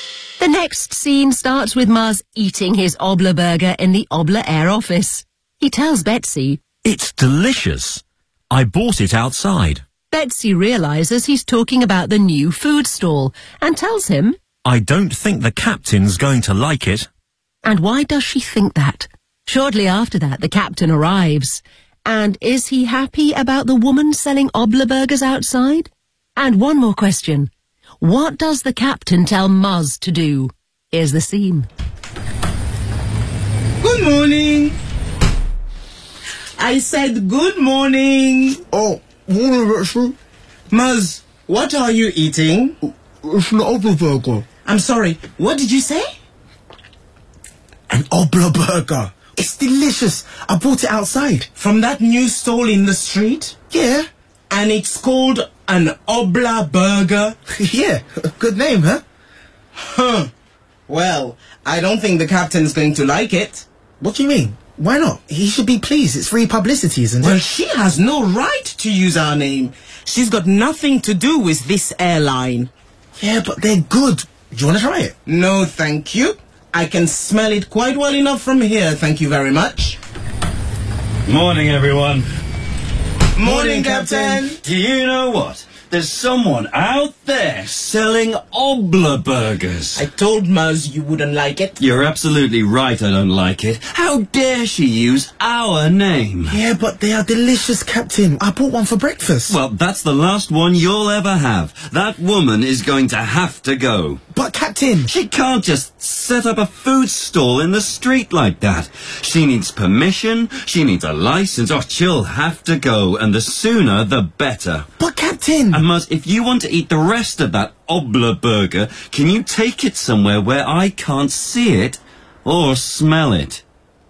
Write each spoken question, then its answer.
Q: And why does she think that?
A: She has no right to use our name.

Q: And is he happy about the woman selling Obler burgers outside?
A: No, he's not.